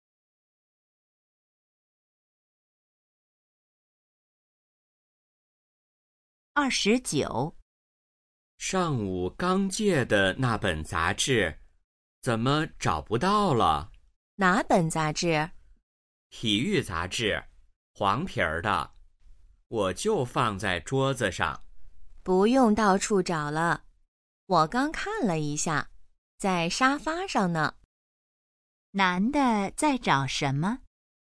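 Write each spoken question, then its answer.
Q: 男的在找什么?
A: 体育杂志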